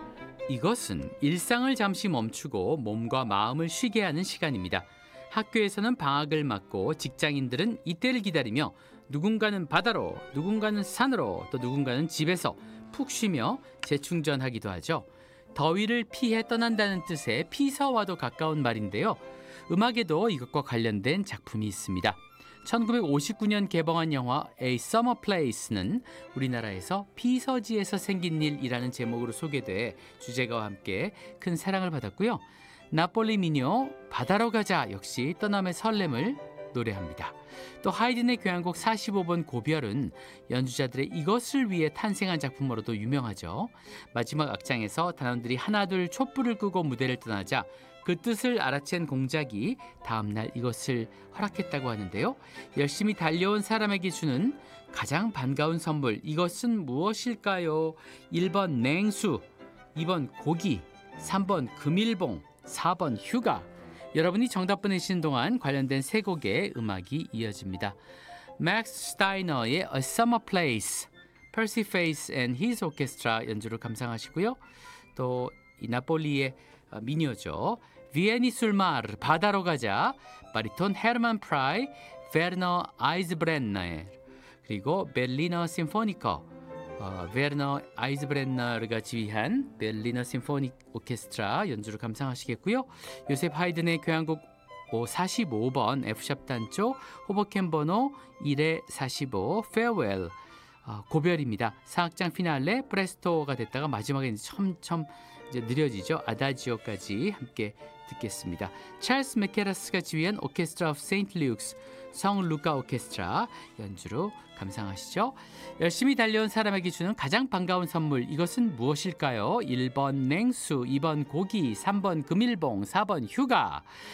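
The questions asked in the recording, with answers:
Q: 열심히 달려온 사람에게 주는 가장 반가운 선물 이것은 무엇일까요?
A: 4번: 휴가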